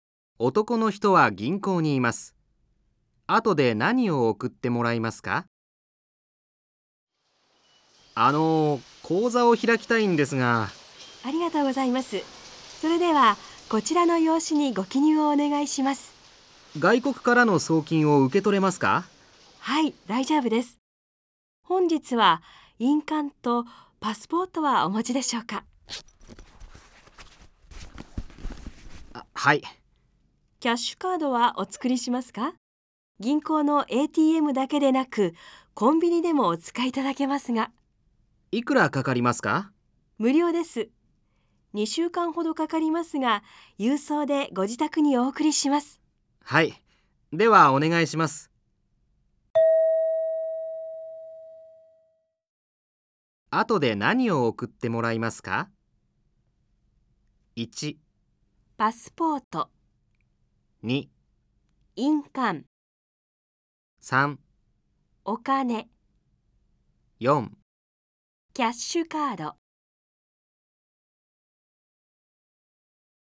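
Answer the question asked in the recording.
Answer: 4: キャッシュカード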